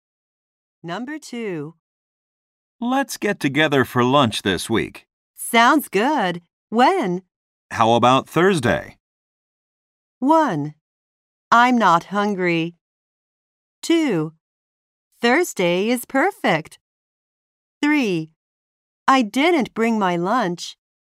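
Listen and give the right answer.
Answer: 2: Thursday is perfect.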